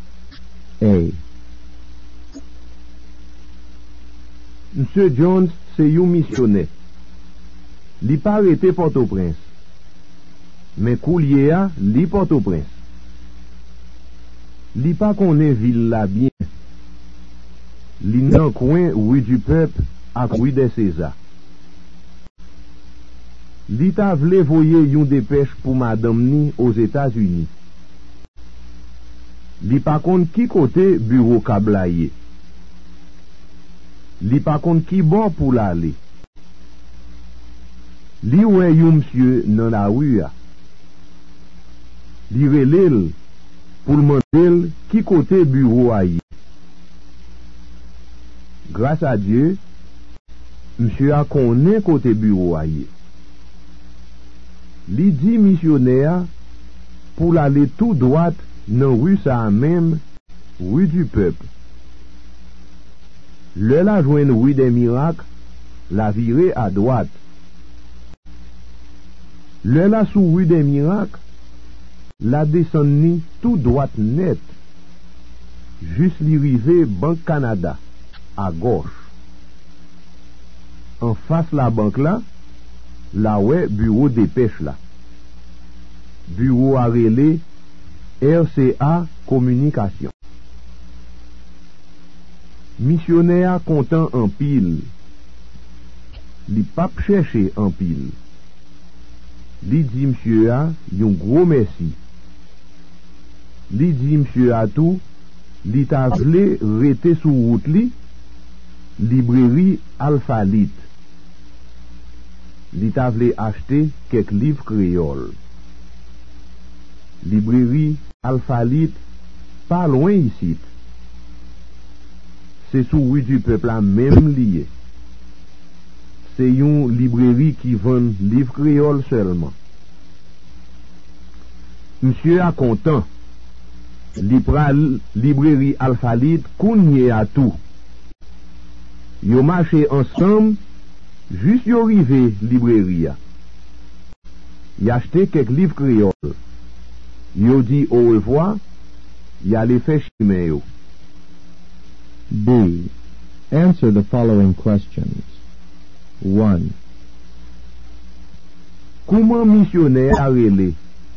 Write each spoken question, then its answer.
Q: Comment missionnaire a rele?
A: Li rele Monsieur Jones.